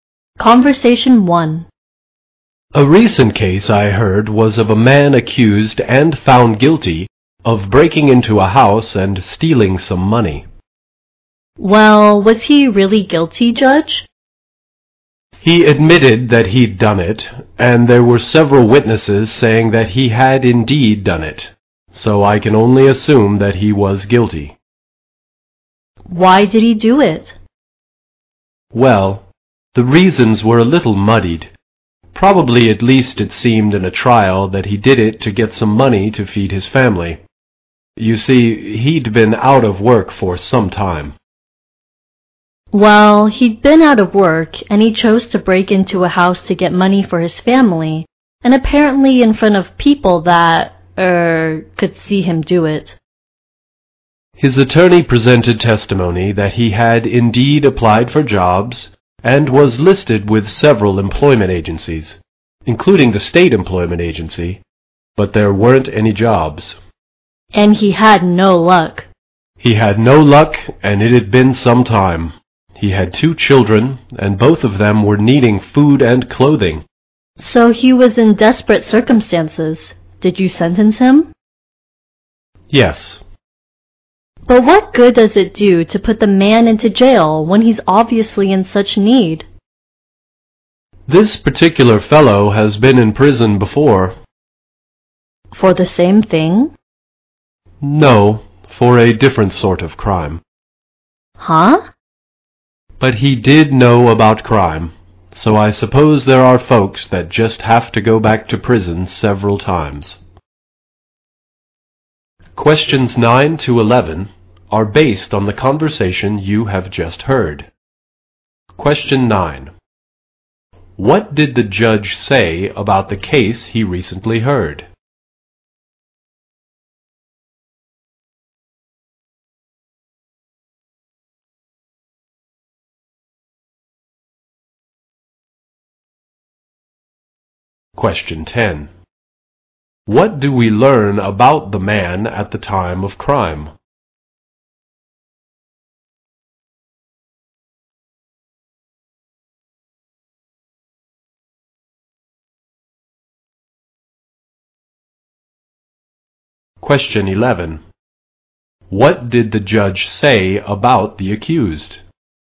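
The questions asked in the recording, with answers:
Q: What did the judge say about the case he recently heard?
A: A man was found guilty of breaking into a house and stealing money.

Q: What do we learn about the man at the time of crime?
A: He had been out of work for some time and needed money to feed his family.

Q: What did the judge say about the accused?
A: He had been in prison before for a different crime.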